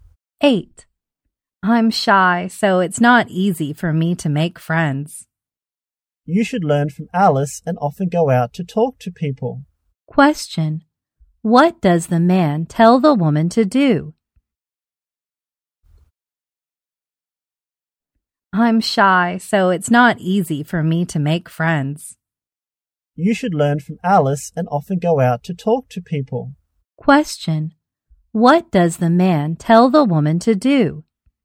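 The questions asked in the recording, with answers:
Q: What does the man tell the woman to do?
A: Learn from Alice and often go out to talk to people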